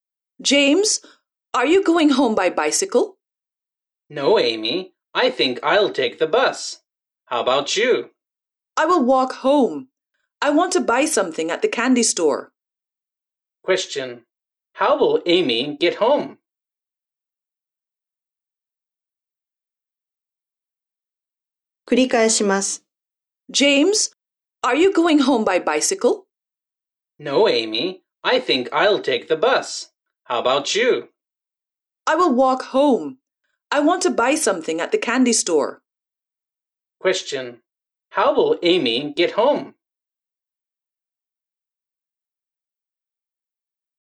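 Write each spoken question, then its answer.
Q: How will Amy get home?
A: She will walk home.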